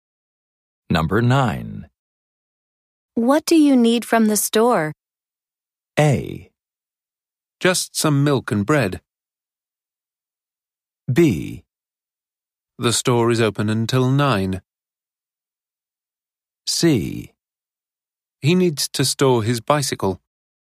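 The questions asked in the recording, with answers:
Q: What do you need from the store?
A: A: Just some milk and bread.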